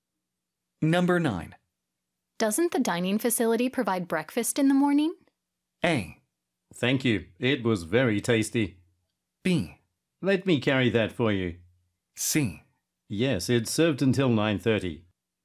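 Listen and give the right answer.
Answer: C: Yes, it's served until 9:30.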